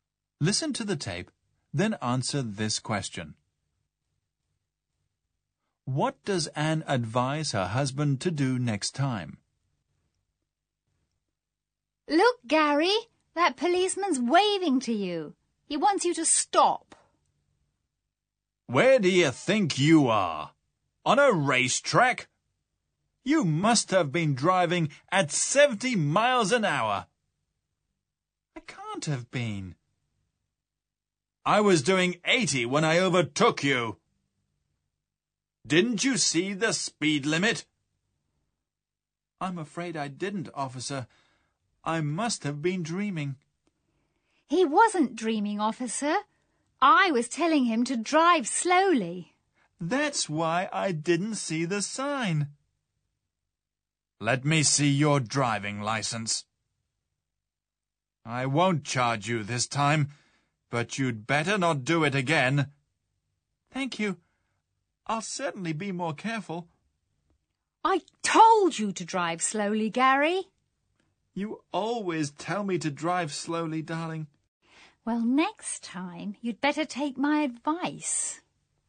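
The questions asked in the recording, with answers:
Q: What does Anne advise her husband to do next time?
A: To take her advice and drive slowly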